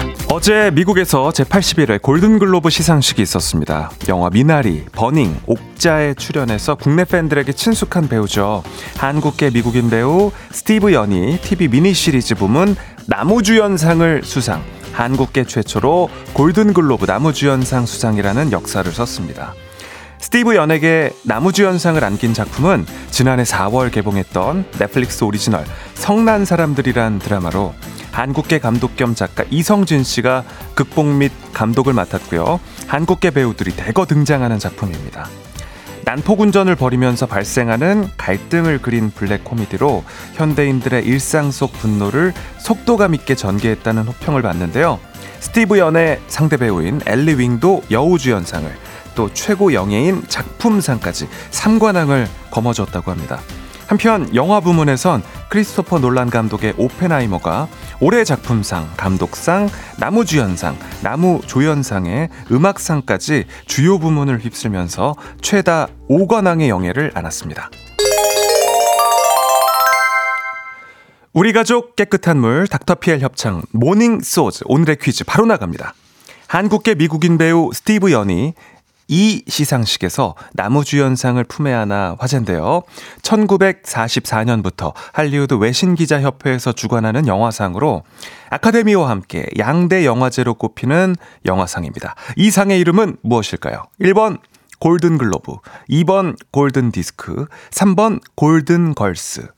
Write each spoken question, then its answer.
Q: 이 상의 이름은 무엇일까요? 1번 골든 글로브, 2번 골든 디스크, 3번 골든 걸스.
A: 정답은 1번 골든 글로브입니다.